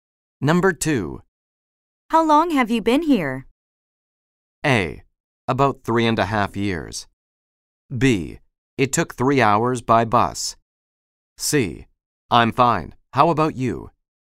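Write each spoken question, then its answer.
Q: How long have you been here?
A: A: About 3.5 years.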